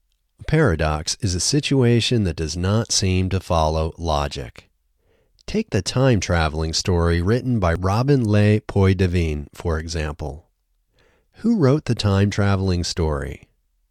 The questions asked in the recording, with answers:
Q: Who wrote the time-traveling story?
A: Robin Le Poydevin wrote the time-traveling story.